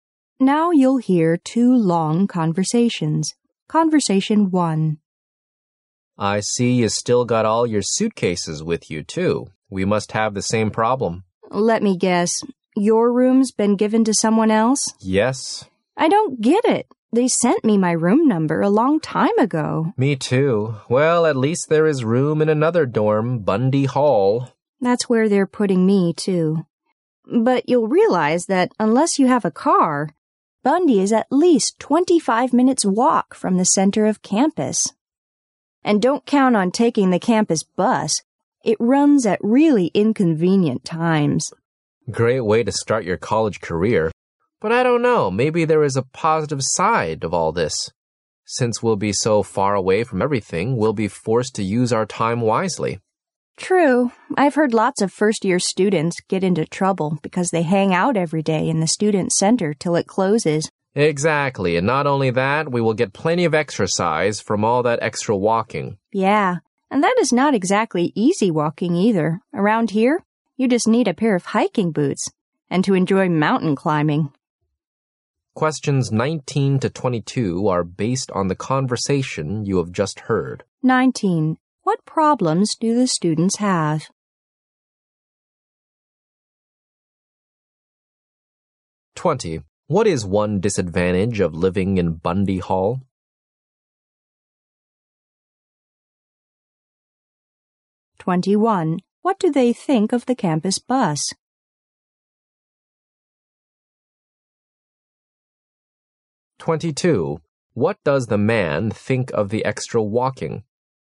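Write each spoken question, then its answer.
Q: What problems do the students have?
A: Their rooms have been given to someone else

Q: What is one disadvantage of living in Bundy Hall?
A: It is at least a 25-minute walk from the center of campus

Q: What do they think of the campus bus?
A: It runs at inconvenient times

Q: What does the man think of the extra walking?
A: It will give them plenty of exercise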